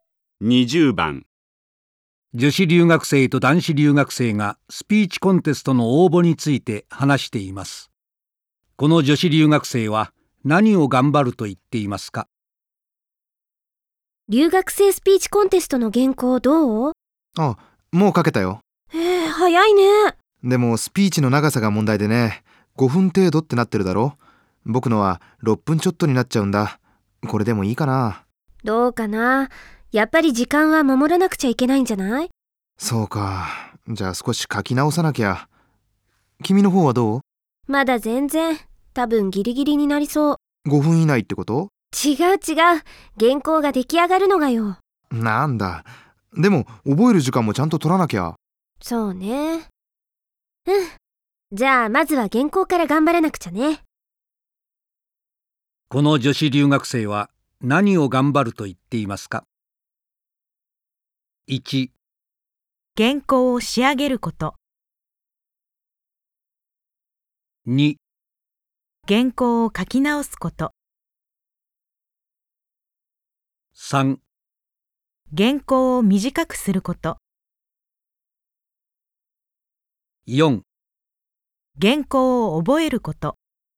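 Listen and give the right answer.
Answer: 1: 原稿を仕上げること。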